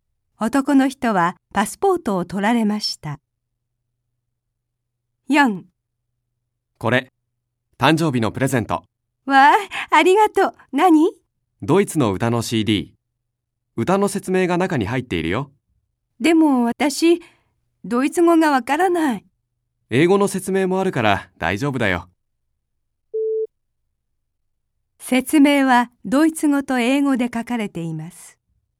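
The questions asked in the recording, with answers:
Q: 説明はドイツ語と英語で書かれています。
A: はい(正しい)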